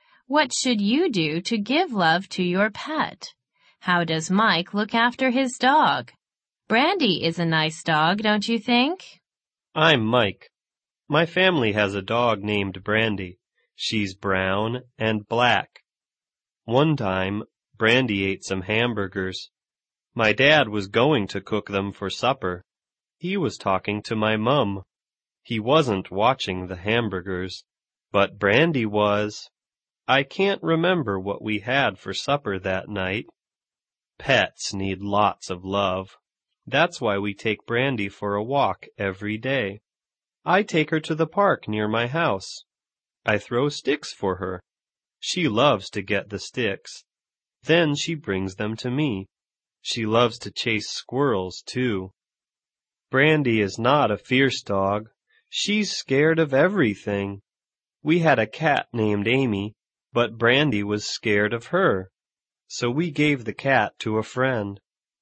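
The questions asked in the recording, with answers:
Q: How does Mike look after his dog?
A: He takes Brandy for a walk every day and throws sticks for her in the park.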